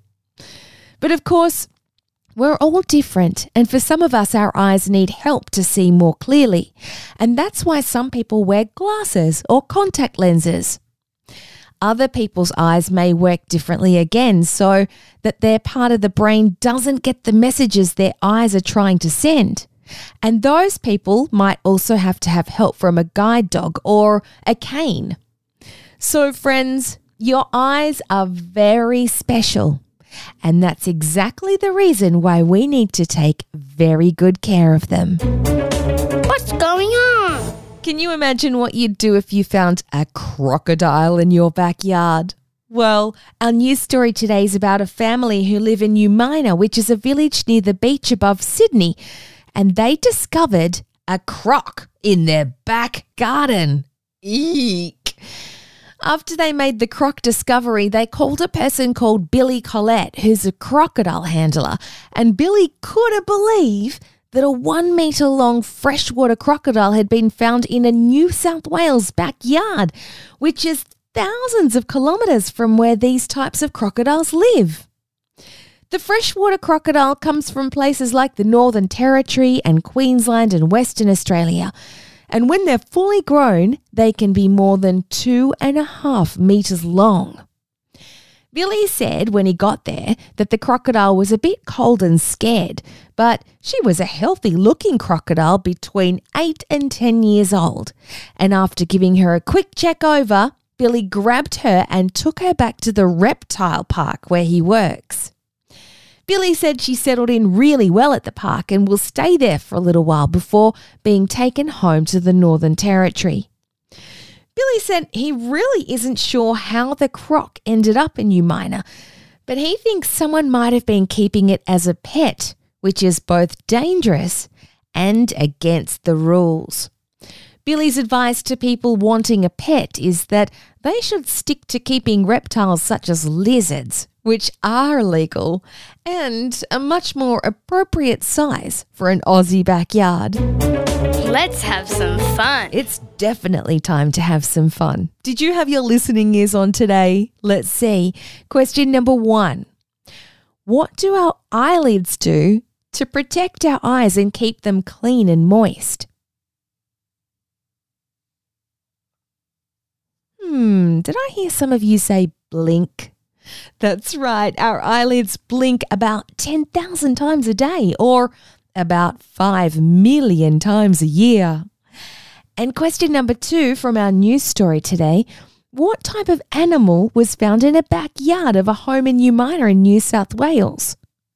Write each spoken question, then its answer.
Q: What type of animal was found in a backyard of a home in Umina in New South Wales?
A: A crocodile is correct. In fact, it was a freshwater crocodile.